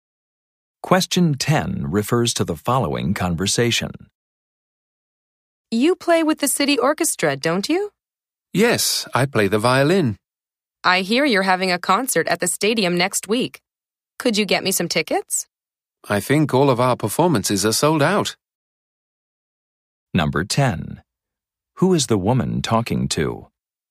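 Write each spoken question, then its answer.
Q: Who is the woman talking to?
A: A violinist in the city orchestra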